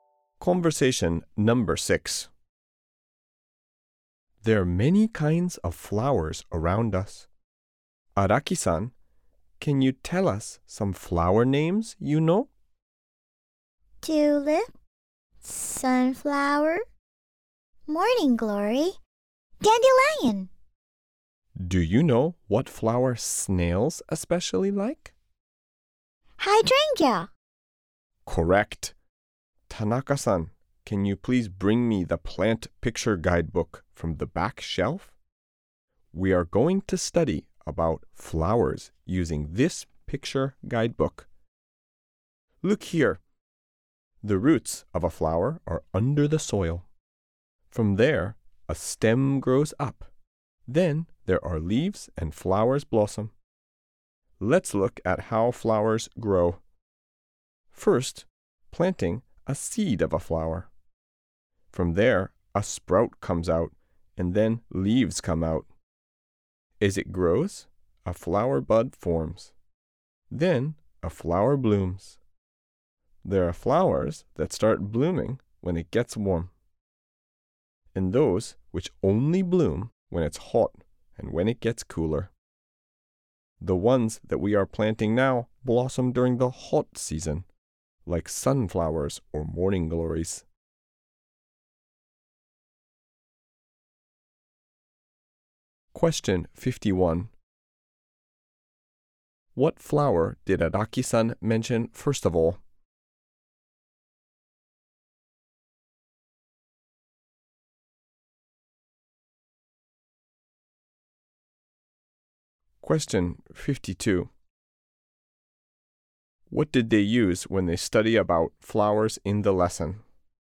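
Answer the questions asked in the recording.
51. Tulip
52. A plant picture guidebook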